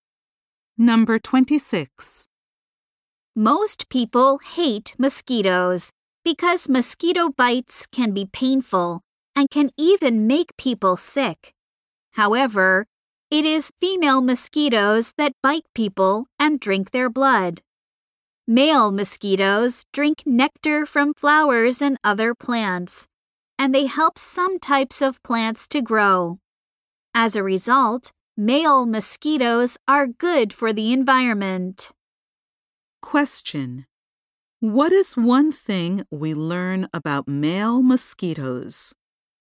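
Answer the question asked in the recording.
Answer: They help some plants grow (they drink nectar, not blood)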